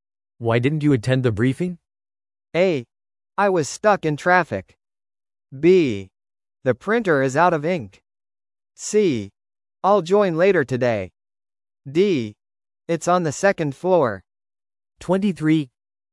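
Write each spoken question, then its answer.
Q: Why didn't you attend the briefing?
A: A: I was stuck in traffic.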